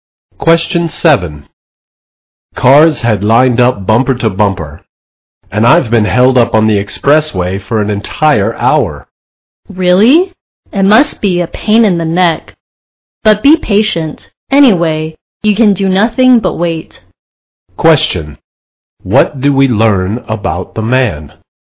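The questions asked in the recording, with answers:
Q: What do we learn about the man?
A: He was stuck in a traffic jam for an hour.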